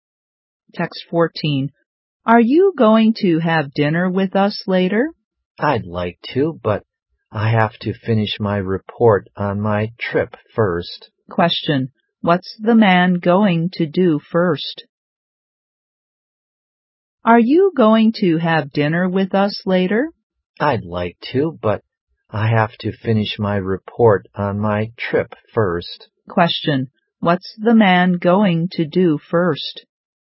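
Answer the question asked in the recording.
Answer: Finish his report on his trip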